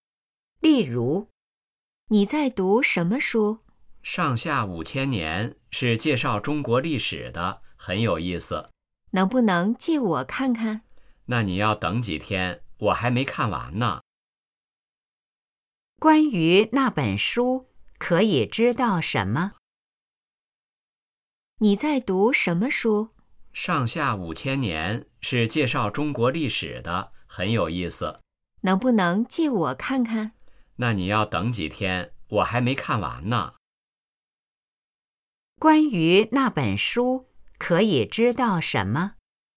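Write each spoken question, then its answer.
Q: 关于那本书,可以知道什么?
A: 是介绍中国历史的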